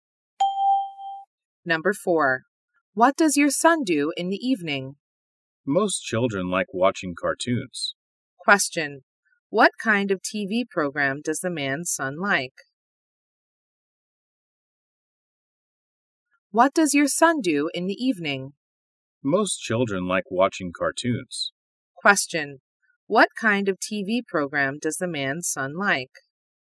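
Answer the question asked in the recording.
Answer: Cartoons.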